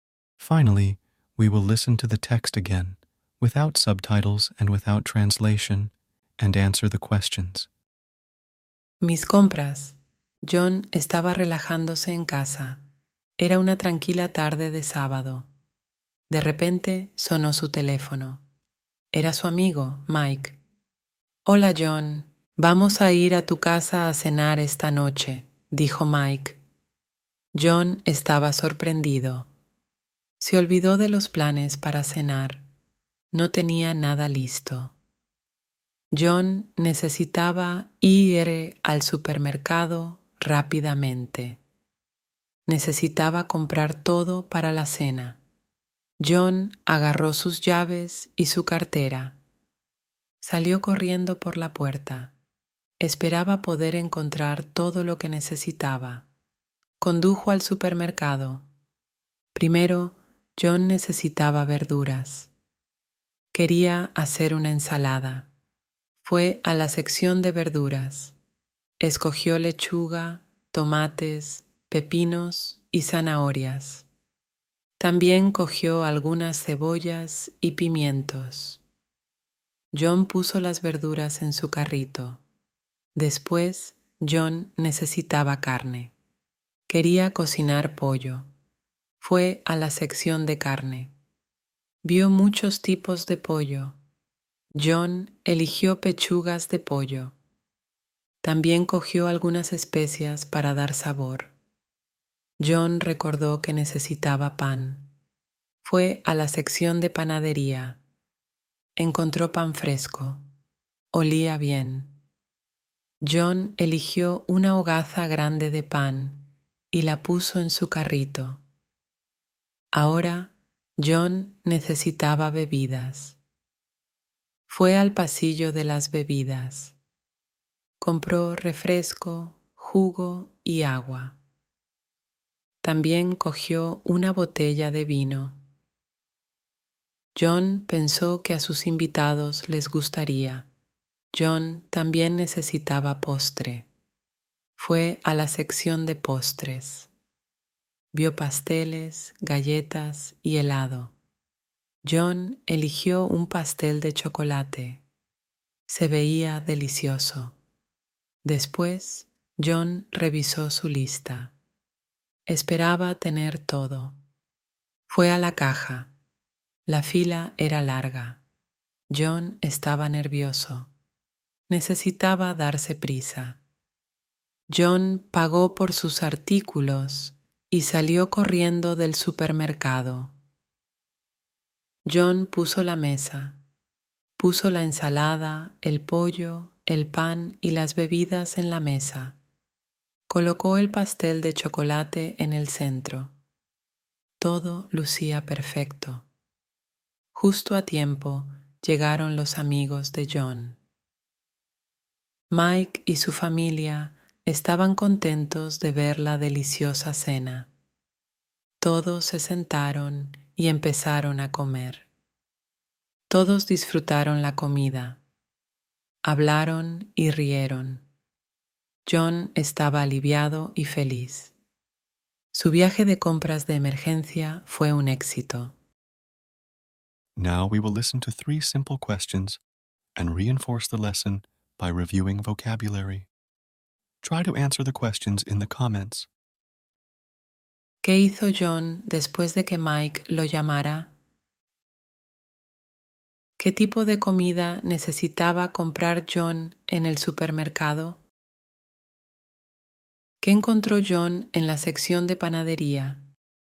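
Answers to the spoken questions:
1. Agarró sus llaves y su cartera y fue rápidamente al supermercado
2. Todo para la cena: verduras, carne (pollo), pan, bebidas y postre
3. Pan fresco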